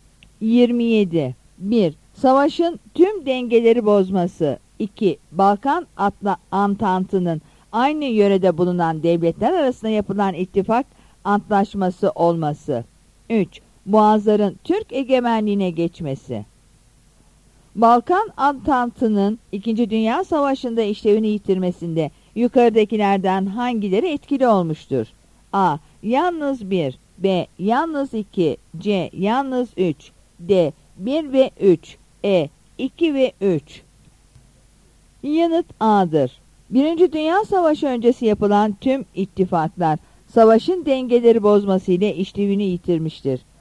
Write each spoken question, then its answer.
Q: Balkan Antantı'nın 2. Dünya Savaşı'nda işlevini yitirmesinde yukarıdakilerden hangileri etkili olmuştur?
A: Yanıt A'dır.